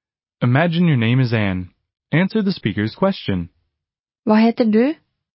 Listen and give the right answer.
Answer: Jeg heter Anne.